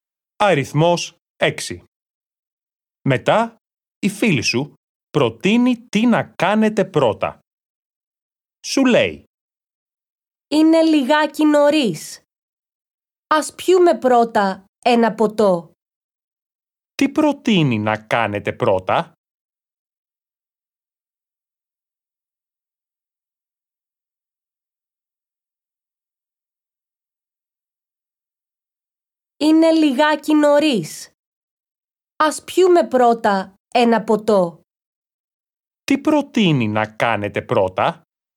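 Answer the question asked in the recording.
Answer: Να πιείτε ένα ποτό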